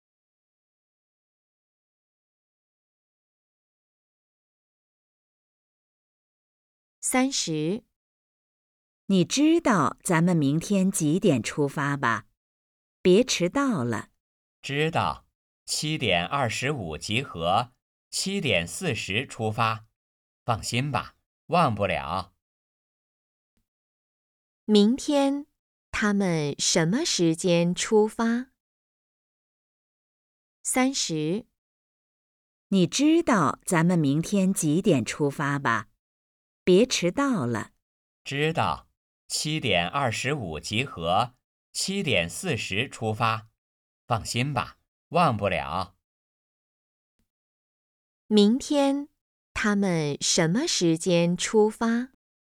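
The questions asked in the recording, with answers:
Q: 明天,他们什么时间出发?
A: 7:40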